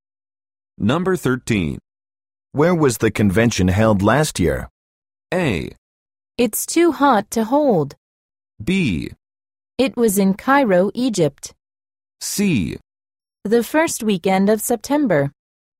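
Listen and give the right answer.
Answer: B: It was in Cairo, Egypt.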